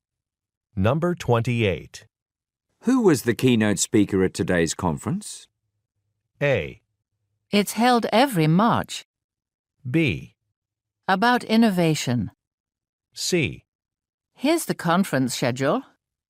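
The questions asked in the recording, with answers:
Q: Who was the keynote speaker at today's conference?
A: C: Here's the conference schedule.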